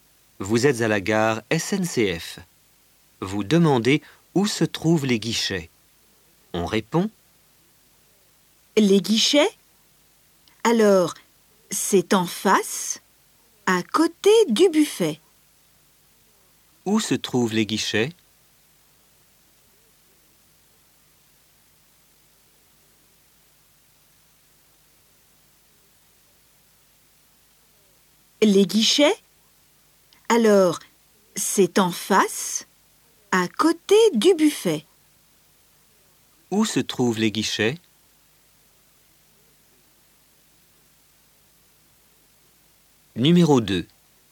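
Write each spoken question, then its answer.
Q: Où se trouvent les guichets?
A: En face, à côté du buffet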